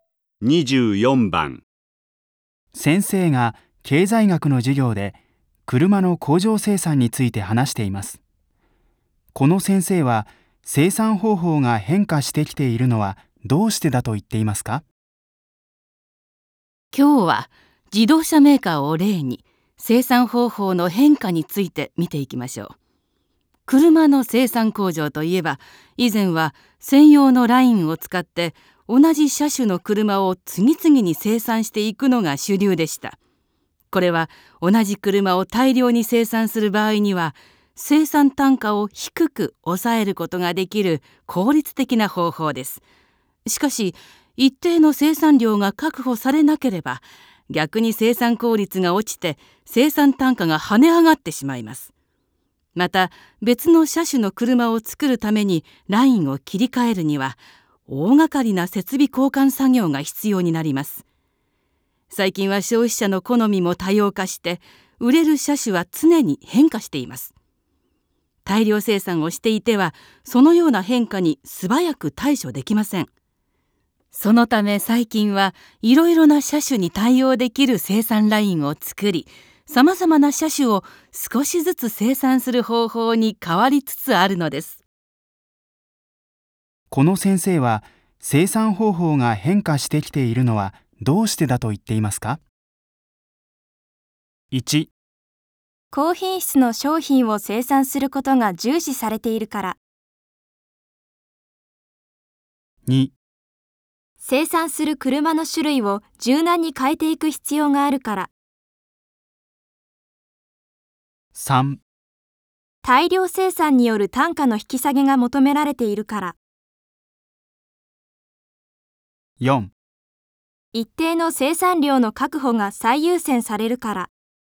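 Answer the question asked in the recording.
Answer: 2: 生産する車の種類を柔軟に変えていく必要があるから。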